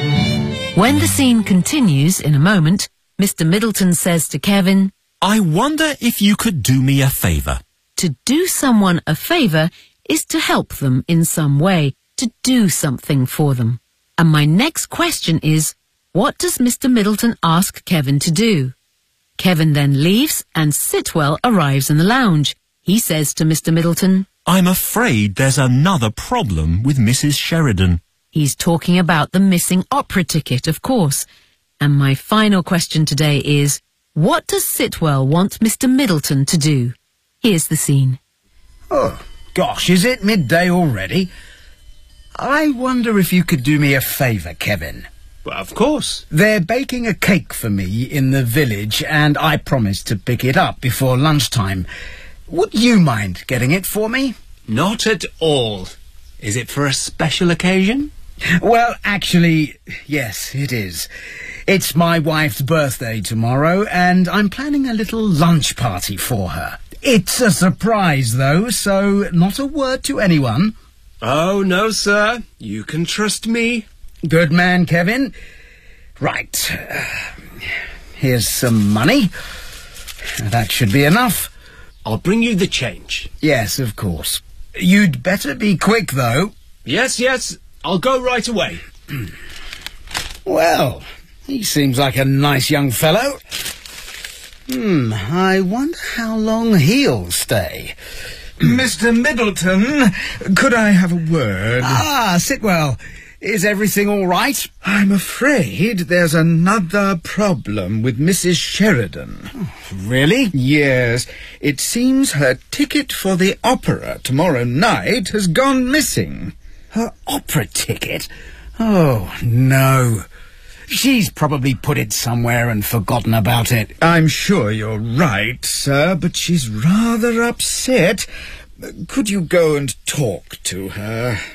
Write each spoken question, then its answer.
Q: Middleton ask Kevin to do?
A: So, Mr. Middleton wants Kevin to go to the village to collect a cake for his wife's birthday party the next day.

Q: Middleton to do? Here's the scene.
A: "She's rather upset. I wonder if you could go and talk to her."